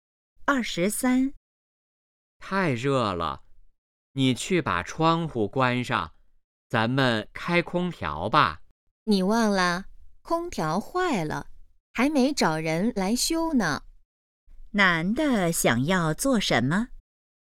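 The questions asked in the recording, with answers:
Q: 男的想要做什么?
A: 开空调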